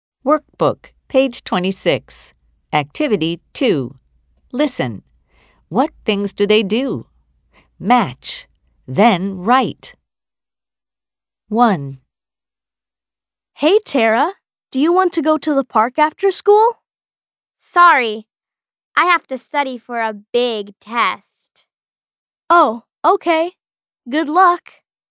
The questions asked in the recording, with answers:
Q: What things do they do?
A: Tara studies for a test.